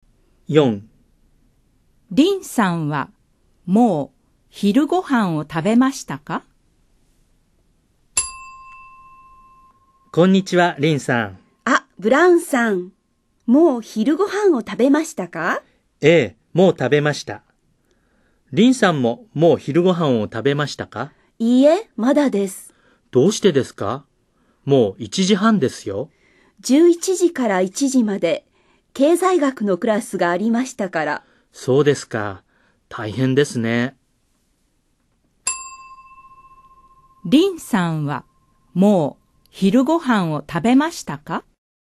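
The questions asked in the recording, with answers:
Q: リンさんはもう昼ご飯を食べましたか?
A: いいえ、まだです。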